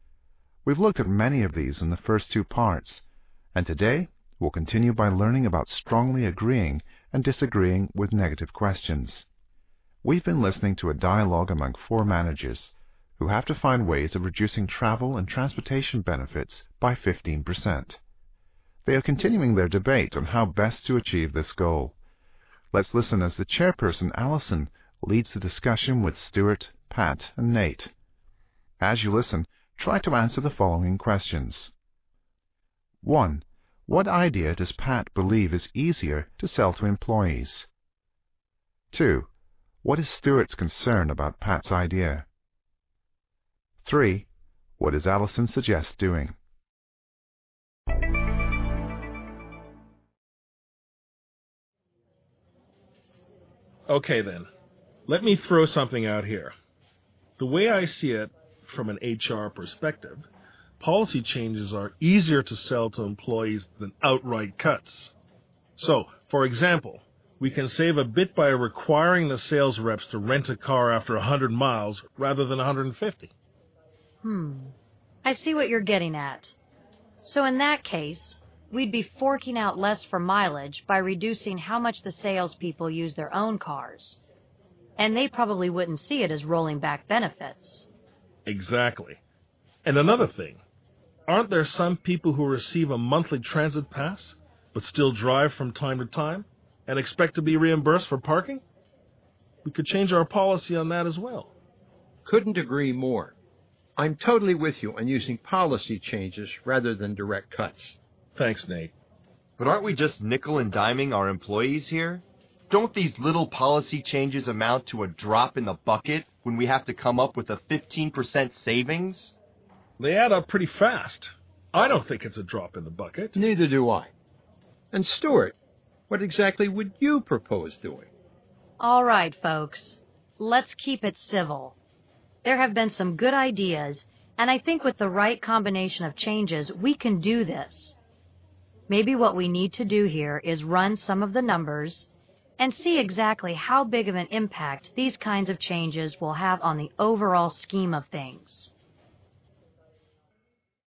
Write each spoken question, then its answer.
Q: What idea does Pat believe is easier to sell to employees?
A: Only then does he present his idea, which is to make policy changes instead of outright or direct cuts.

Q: What is Stuart's concern about Pat's idea?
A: Stuart's concern is that the changes being discussed are just nickel and diming the employees.

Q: What does Allison suggest doing?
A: Then she suggests running the numbers on the proposed changes.